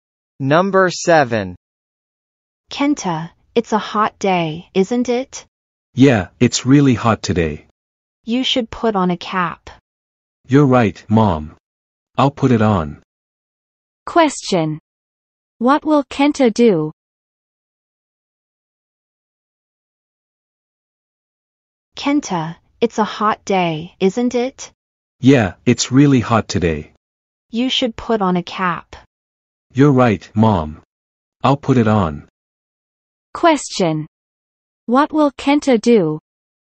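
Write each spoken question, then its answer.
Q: What will Kenta do?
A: He will put on a cap.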